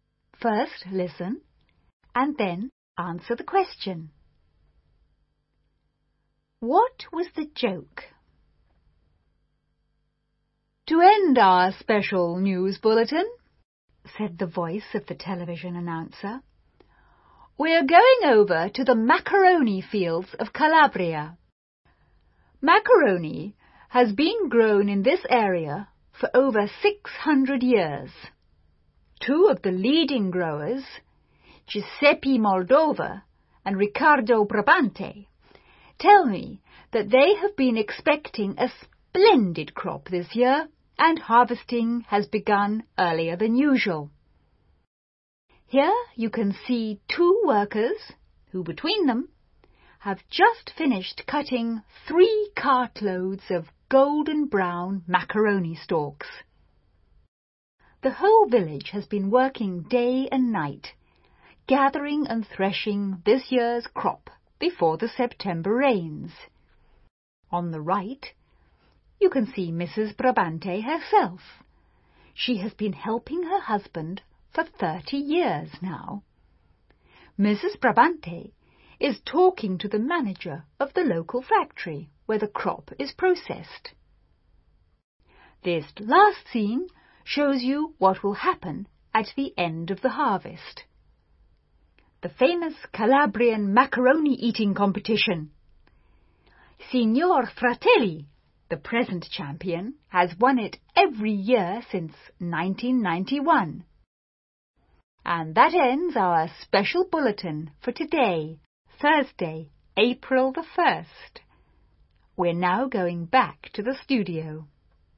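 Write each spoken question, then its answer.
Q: What was the joke?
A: The bulletin pretended macaroni grows as a crop in fields and is harvested, as an April Fool's joke.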